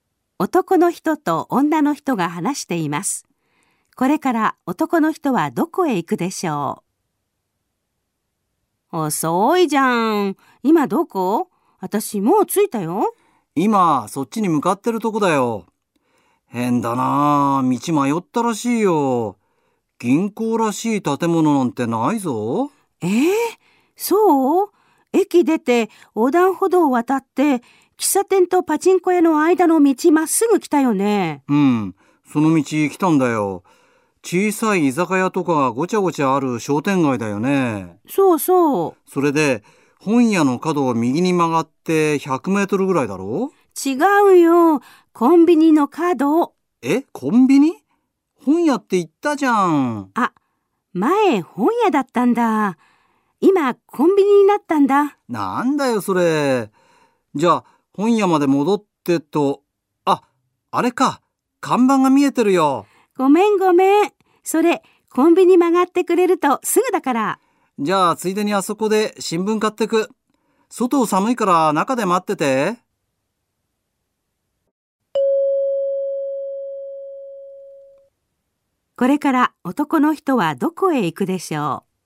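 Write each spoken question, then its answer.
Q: これから男の人はどこへ行くでしょう?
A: コンビニ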